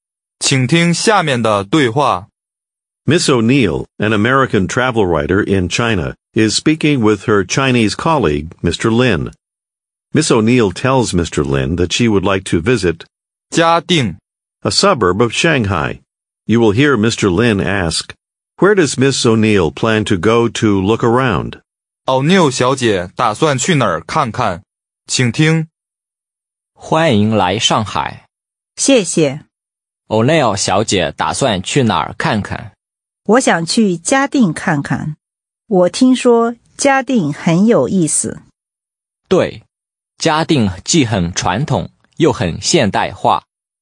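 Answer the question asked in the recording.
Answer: 嘉定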